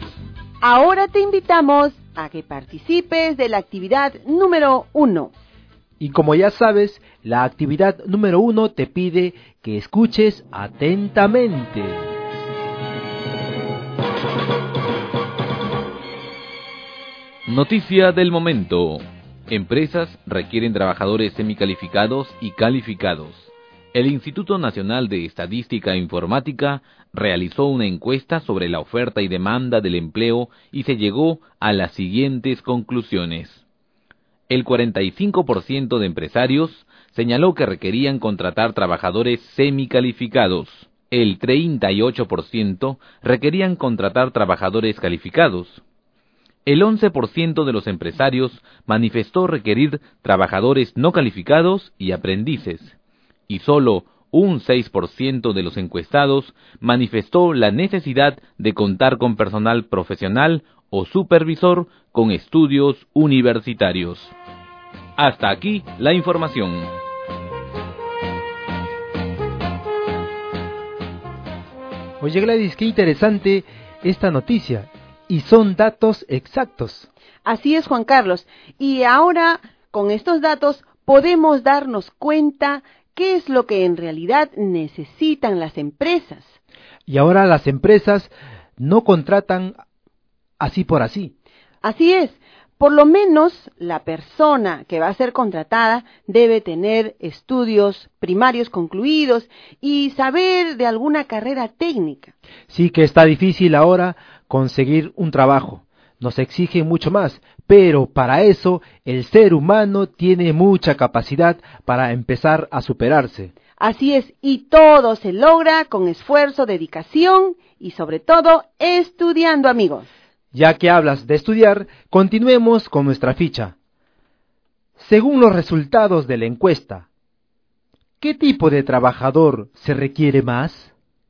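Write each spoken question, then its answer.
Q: Según los resultados de la encuesta, ¿qué tipo de trabajador se requiere más?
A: Los trabajadores semicalificados (45%)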